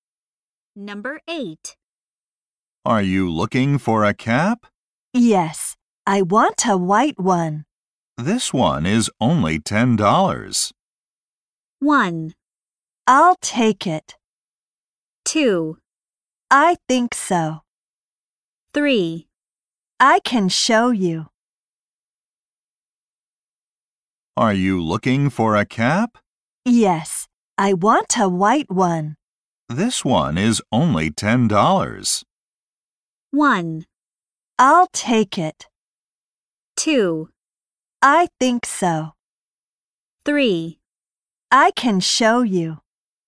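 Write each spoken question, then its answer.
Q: This one is only $10.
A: 1: I'll take it.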